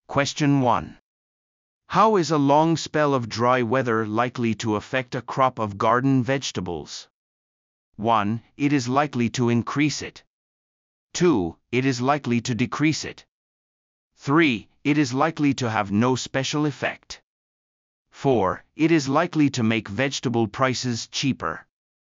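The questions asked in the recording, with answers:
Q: How is a long spell of dry weather likely to affect a crop of garden vegetables?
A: 2: It is likely to decrease it.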